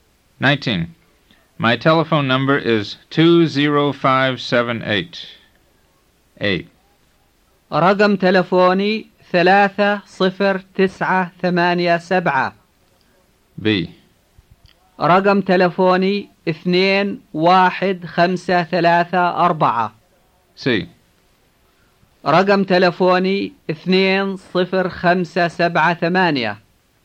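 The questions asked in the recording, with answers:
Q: My telephone number is 20578.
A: C: رقم تلفوني 20578.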